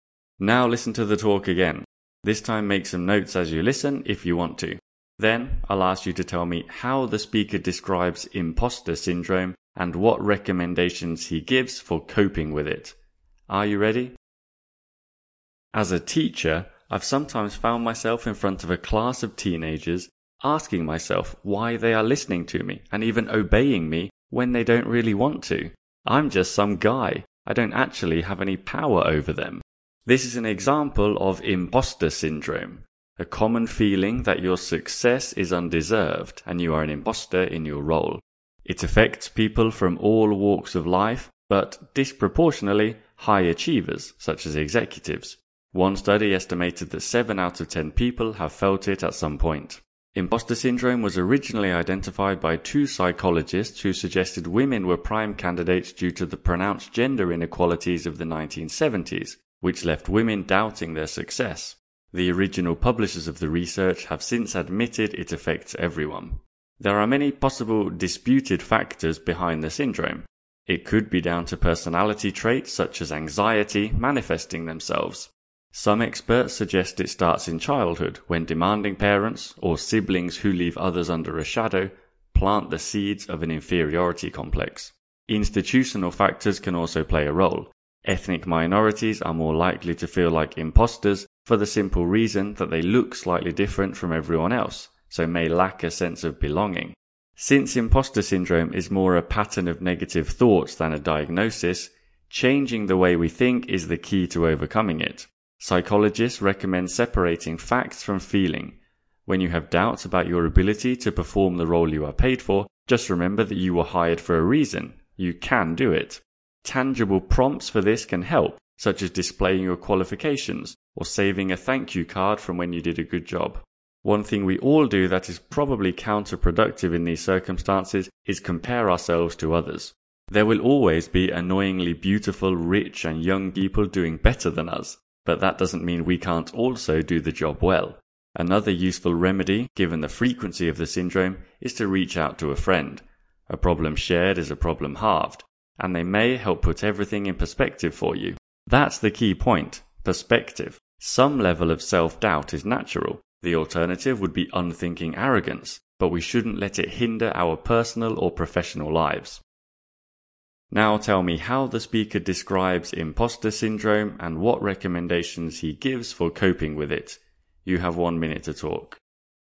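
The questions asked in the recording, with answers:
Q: Now tell me how the speaker describes imposter syndrome and what recommendations he gives for coping with it.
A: He describes it as a common feeling that your success is undeserved and that you are an imposter in your role. He recommends separating facts from feelings, remembering you were hired for a reason, keeping reminders such as qualifications or thank-you cards, not comparing yourself to others, and talking to a friend to keep things in perspective.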